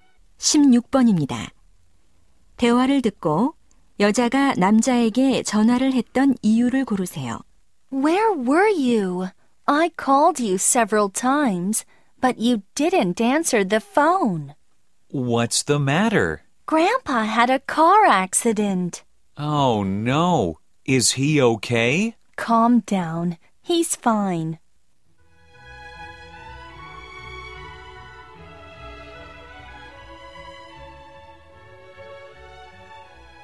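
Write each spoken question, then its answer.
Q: 여자가 남자에게 전화를 했던 이유를 고르세요.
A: 할아버지가 교통사고를 당해서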